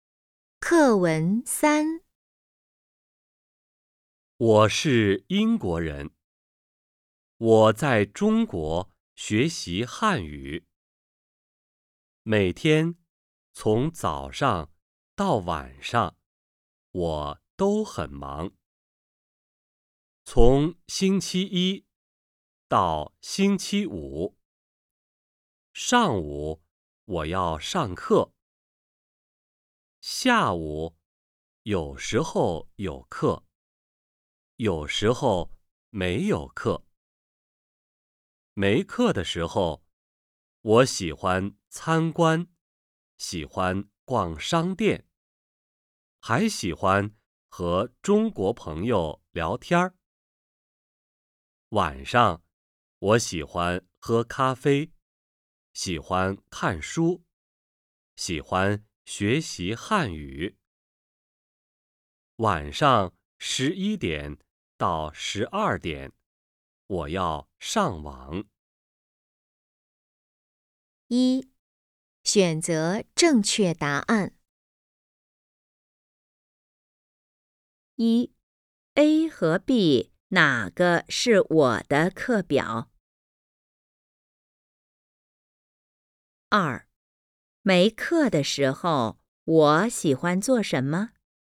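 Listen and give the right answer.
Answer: 参观、逛商店、和中国朋友聊天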